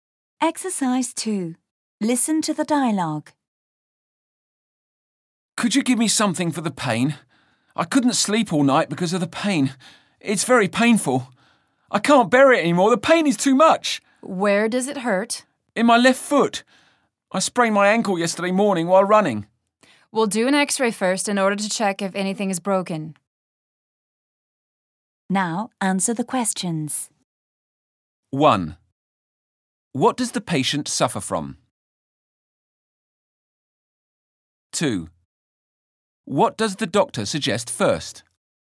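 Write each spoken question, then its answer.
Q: What does the patient suffer from?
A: A sprained ankle (pain in the left foot)

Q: What does the doctor suggest first?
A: An X-ray, to check if anything is broken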